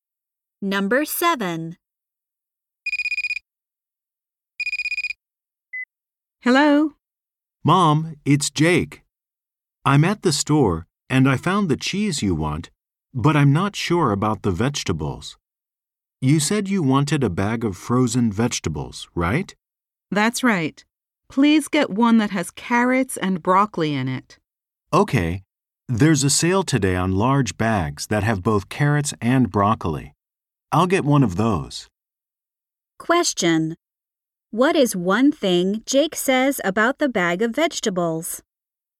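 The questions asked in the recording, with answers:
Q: What is one thing Jake says about the bag of vegetables?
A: Large bags with carrots and broccoli are on sale today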